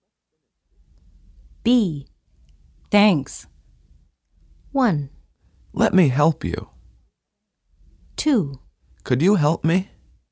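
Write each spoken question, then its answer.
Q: Thanks.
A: 1: Let me help you.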